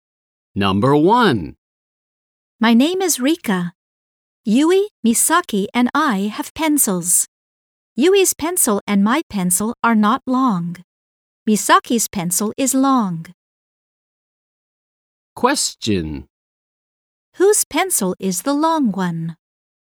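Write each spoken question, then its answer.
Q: Whose pencil is the long one?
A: Misaki's pencil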